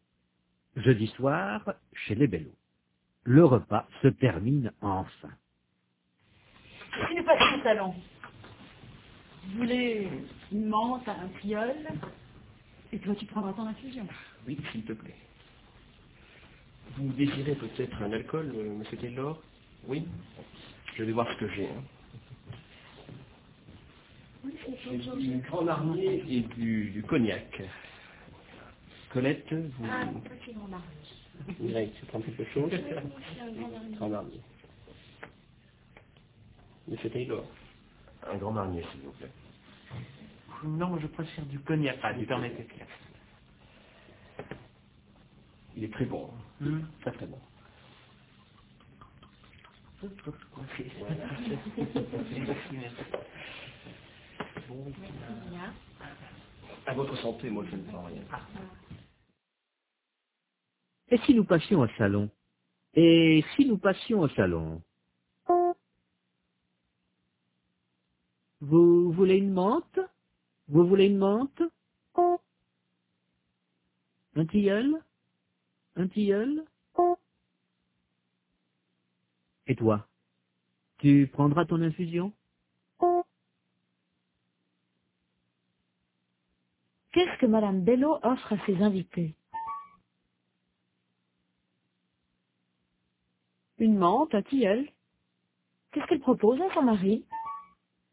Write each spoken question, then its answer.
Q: Qu'est-ce que Madame Bello offre à ses invités?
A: Une menthe, un tilleul.

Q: Qu'est-ce qu'elle propose à son mari?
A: Son infusion.